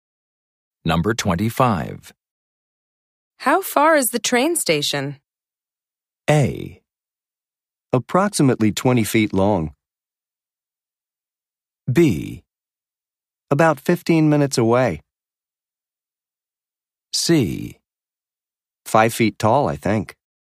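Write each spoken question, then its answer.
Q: How far is the train station?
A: B: About 15 minutes away.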